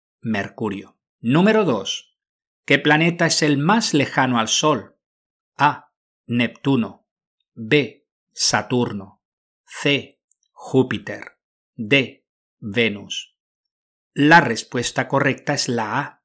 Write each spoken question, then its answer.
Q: ¿Qué planeta es el más lejano al Sol?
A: La respuesta correcta es la A. Neptuno.